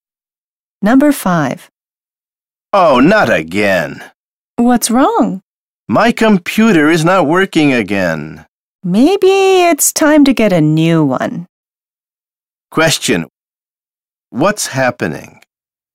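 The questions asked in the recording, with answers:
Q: What's happening?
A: The computer is not working again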